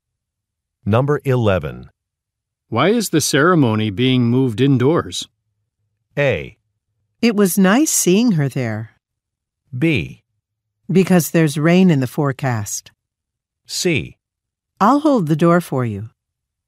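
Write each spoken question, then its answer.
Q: Why is the ceremony being moved indoors?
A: B: Because there's rain in the forecast.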